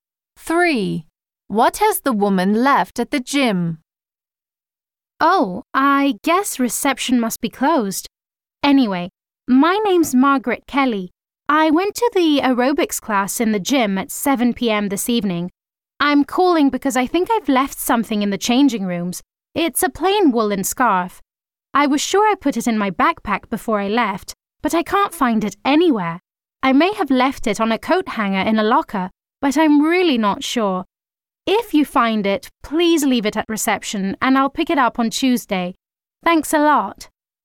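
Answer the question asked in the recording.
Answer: A plain woolen scarf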